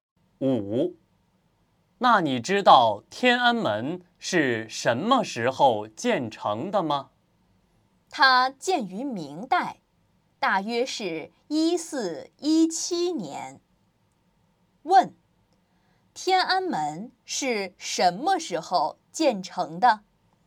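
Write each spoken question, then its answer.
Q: 天安门是什么时候建成的?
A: 明代,大约1417年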